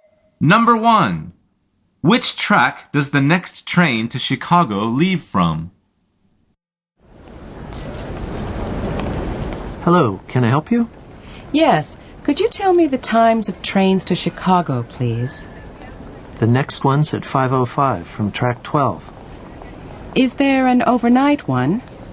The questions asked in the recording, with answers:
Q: Which track does the next train to Chicago leave from?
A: The answer is 12.